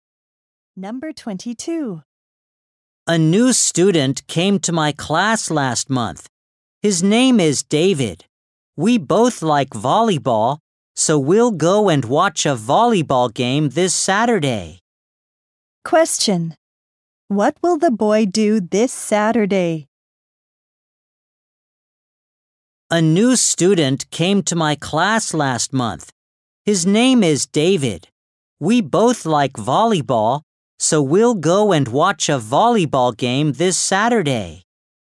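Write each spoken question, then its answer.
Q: Question. What will the boy do this Saturday?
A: Watch a volleyball game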